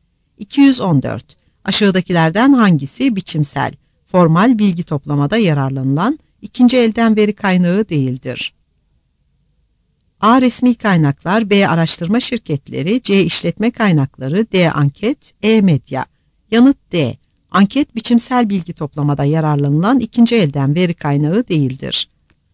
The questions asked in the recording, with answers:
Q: Aşağıdakilerden hangisi biçimsel, formal bilgi toplamada yararlanılan ikinci elden veri kaynağı değildir?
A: Yanıt D.